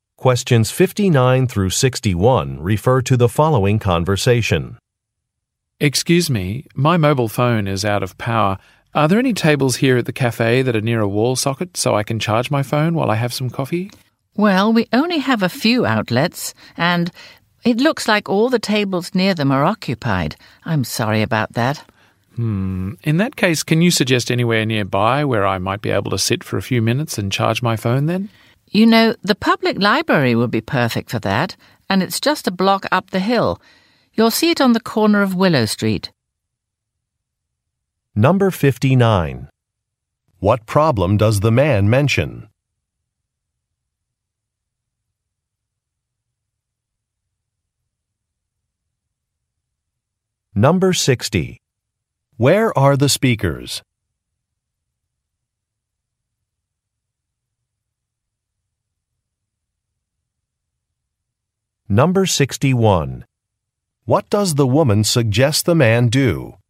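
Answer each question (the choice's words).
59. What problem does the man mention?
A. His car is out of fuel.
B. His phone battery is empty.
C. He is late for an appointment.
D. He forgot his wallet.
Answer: His phone battery is empty.

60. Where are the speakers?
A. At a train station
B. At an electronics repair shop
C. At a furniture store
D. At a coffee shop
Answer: At a coffee shop

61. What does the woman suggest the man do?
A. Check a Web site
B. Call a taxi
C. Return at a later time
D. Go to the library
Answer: Go to the library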